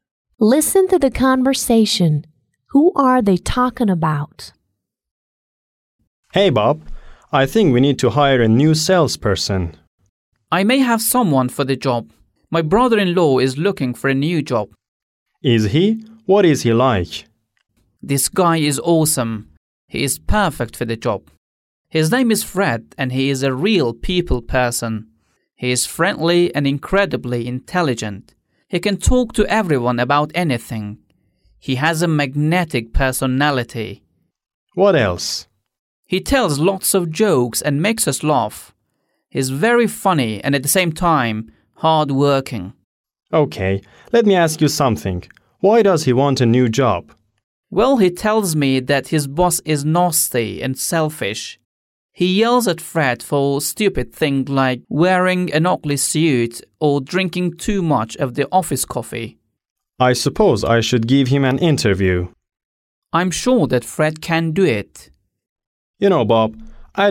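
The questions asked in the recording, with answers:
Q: Who are they talking about?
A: Fred, the speaker's brother-in-law, who might be hired as a salesperson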